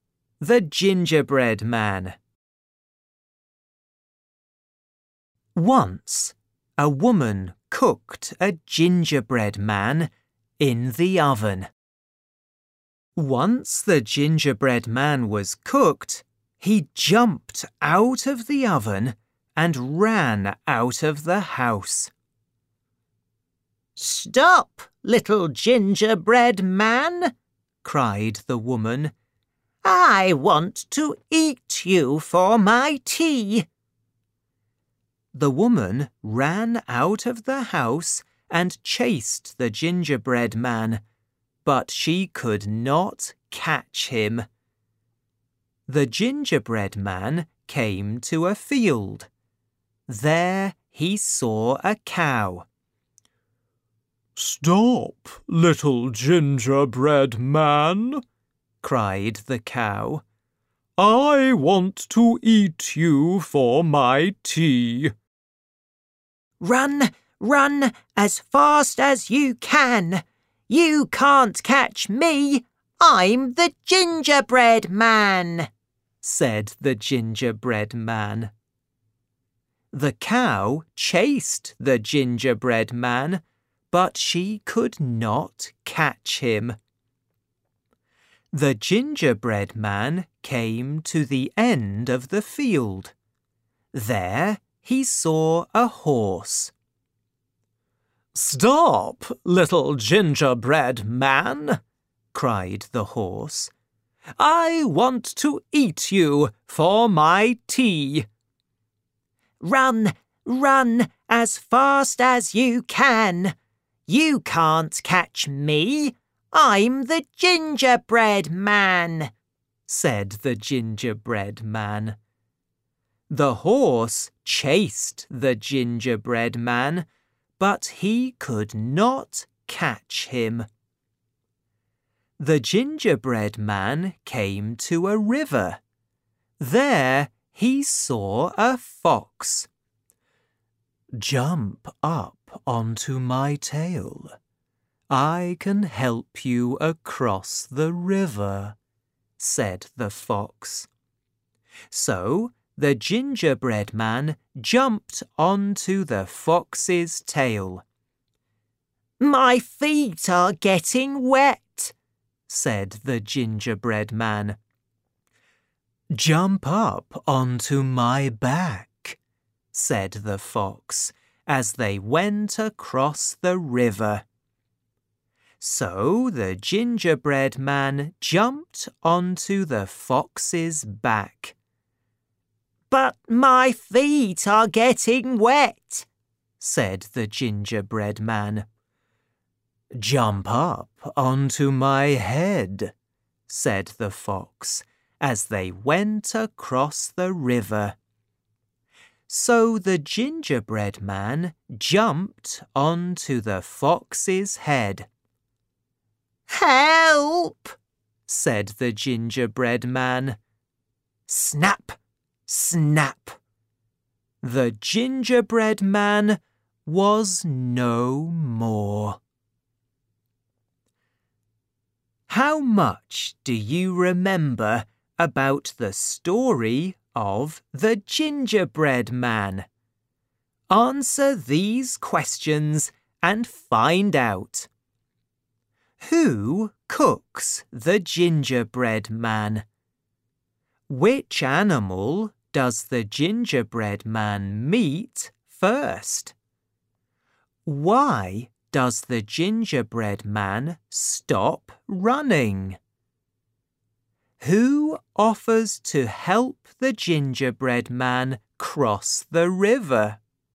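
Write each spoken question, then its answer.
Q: Who cooks the gingerbread man?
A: A woman

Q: Which animal does the gingerbread man meet first?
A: A cow

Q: Why does the gingerbread man stop running?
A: He came to a river

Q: Who offers to help the gingerbread man cross the river?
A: The fox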